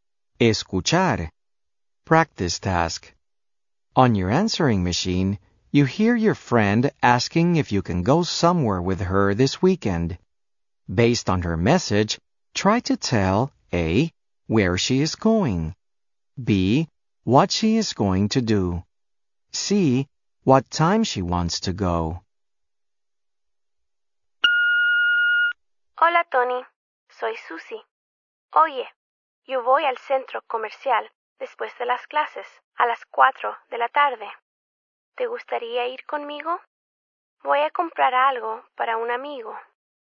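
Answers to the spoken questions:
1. al centro comercial
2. comprar algo para un amigo
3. a las 4 de la tarde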